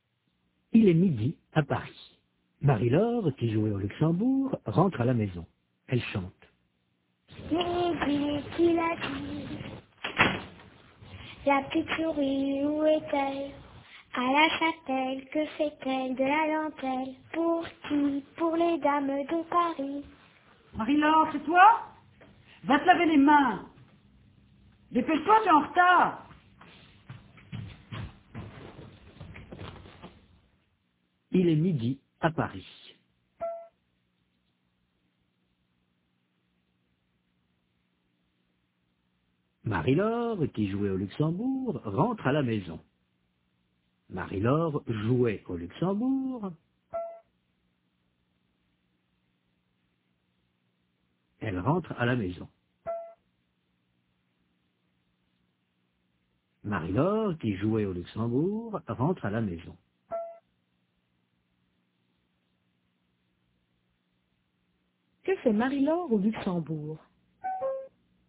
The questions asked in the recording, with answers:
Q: Que fait Marie-Laure au Luxembourg?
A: Elle joue.